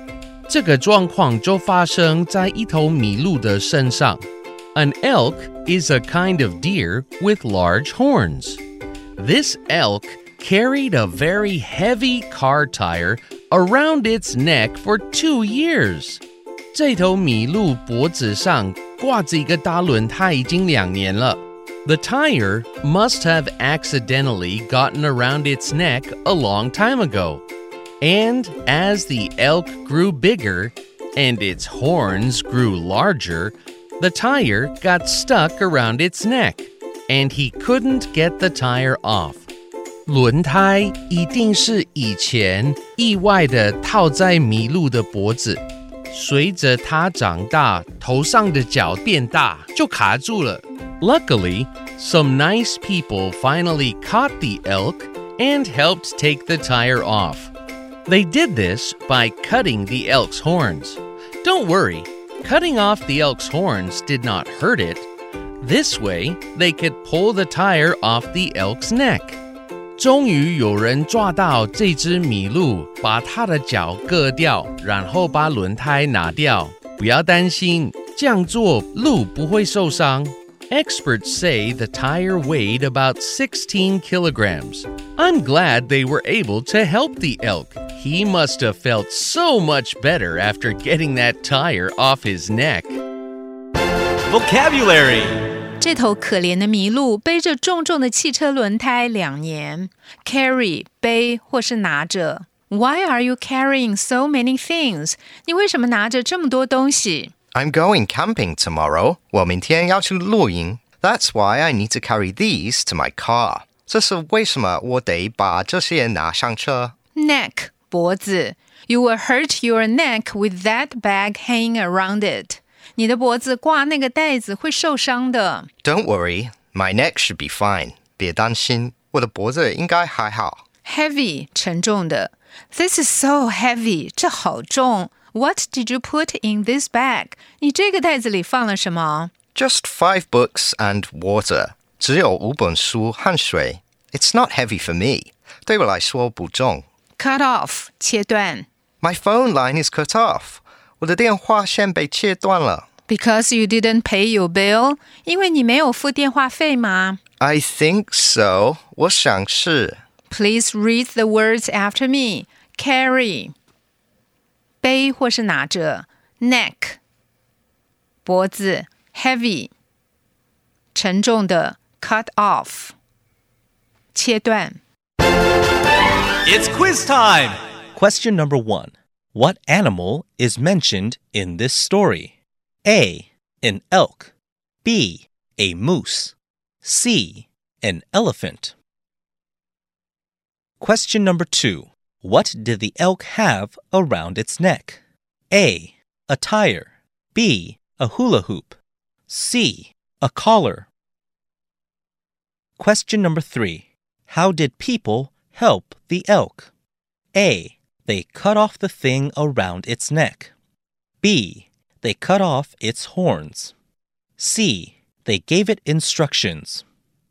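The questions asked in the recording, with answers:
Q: What animal is mentioned in this story?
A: A: An elk.

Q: What did the elk have around its neck?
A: A: A tire.

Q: How did people help the elk?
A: B: They cut off its horns.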